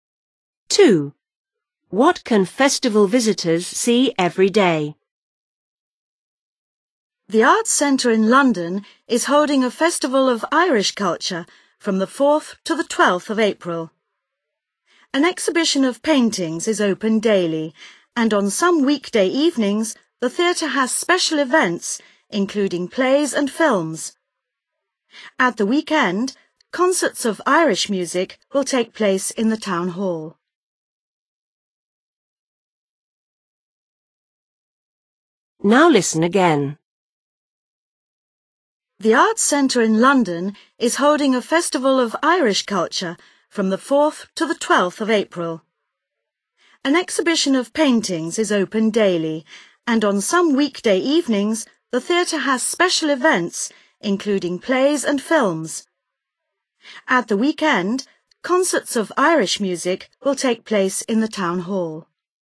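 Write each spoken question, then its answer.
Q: What can festival visitors see every day?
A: an exhibition of paintings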